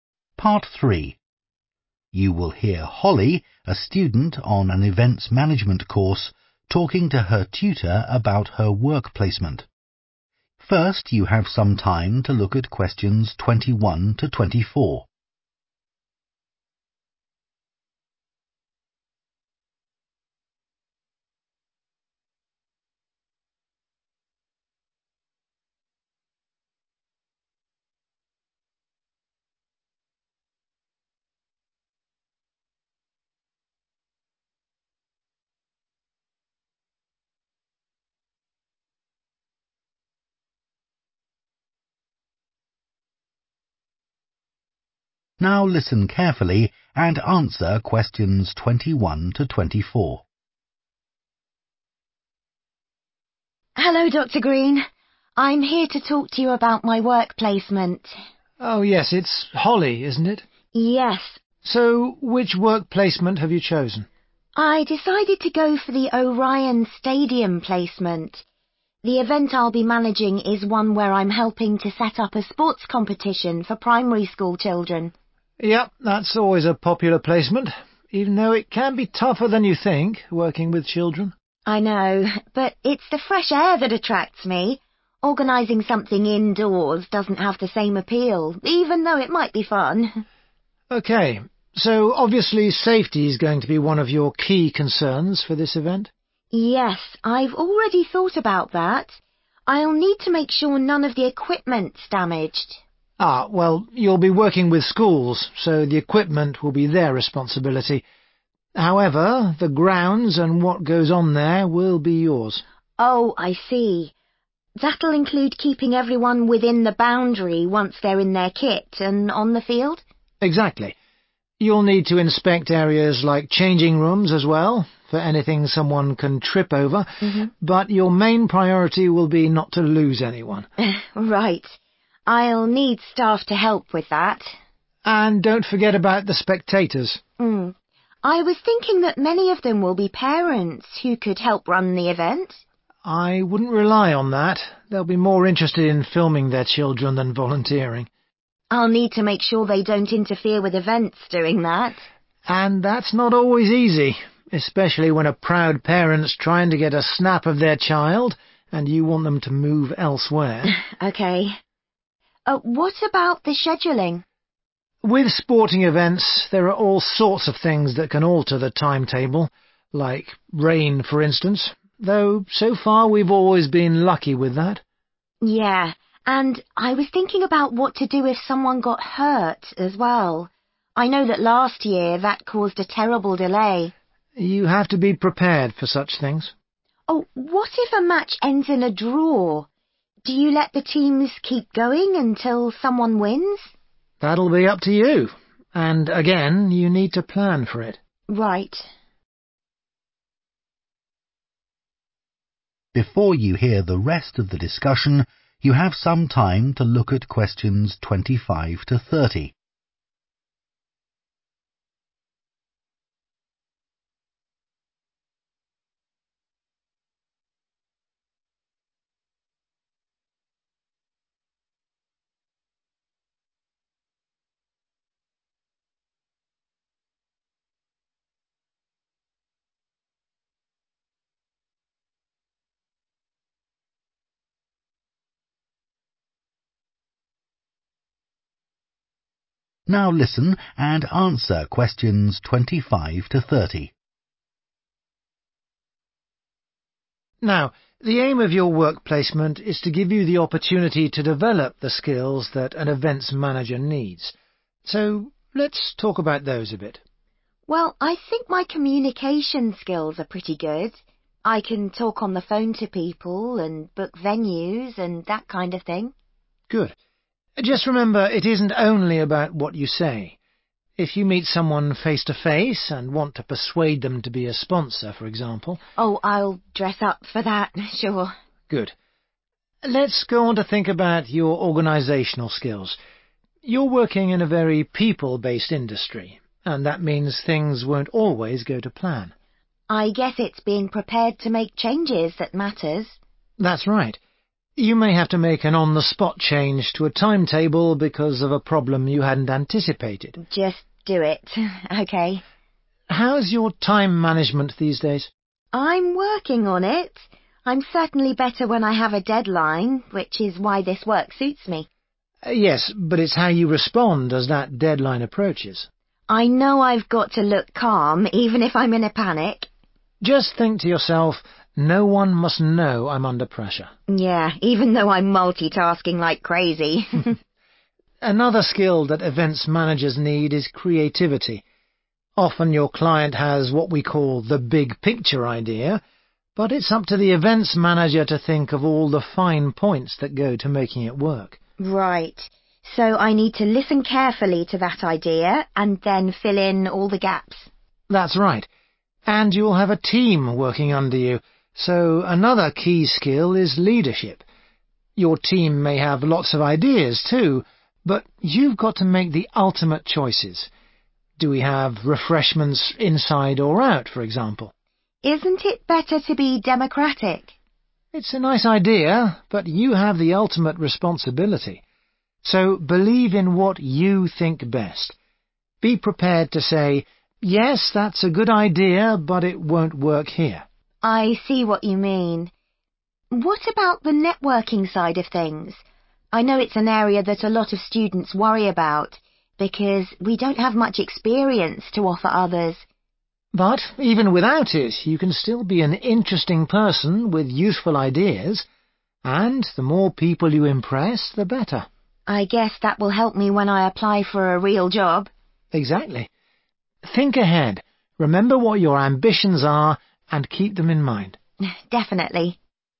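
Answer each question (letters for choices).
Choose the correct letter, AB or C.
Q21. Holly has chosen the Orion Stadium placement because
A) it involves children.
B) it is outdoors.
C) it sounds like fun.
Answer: B

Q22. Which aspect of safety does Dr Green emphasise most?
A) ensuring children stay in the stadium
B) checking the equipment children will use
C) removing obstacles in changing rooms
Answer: A

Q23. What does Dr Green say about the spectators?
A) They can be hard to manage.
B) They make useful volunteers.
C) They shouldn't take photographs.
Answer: A

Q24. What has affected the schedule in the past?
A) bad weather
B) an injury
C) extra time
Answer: B

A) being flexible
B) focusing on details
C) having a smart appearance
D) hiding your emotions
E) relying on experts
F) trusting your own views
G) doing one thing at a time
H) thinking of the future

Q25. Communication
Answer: C

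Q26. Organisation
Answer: A

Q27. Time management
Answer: D

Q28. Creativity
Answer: B

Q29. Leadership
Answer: F

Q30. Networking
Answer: H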